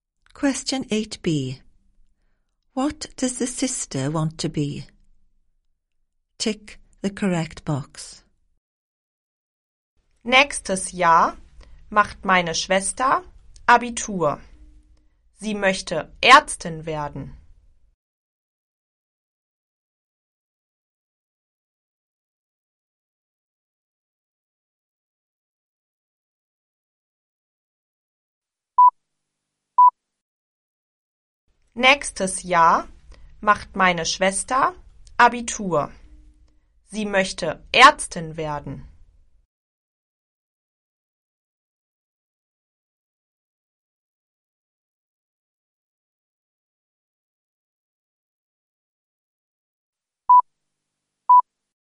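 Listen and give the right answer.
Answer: A doctor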